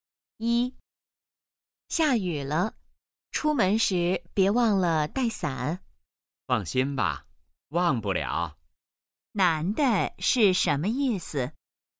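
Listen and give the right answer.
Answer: 他不会忘记带伞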